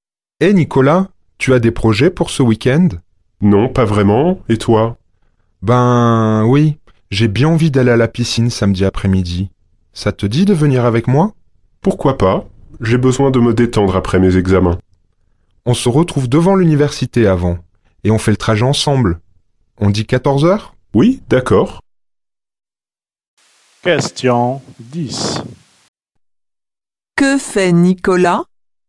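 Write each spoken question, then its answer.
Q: Que fait Nicolas ?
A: Il accepte d'aller à la piscine samedi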